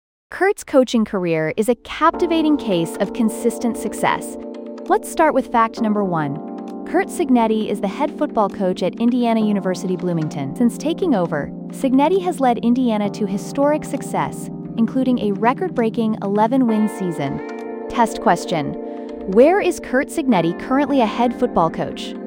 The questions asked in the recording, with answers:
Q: where is Kurt Cignetti currently a head football coach?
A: Indiana University Bloomington.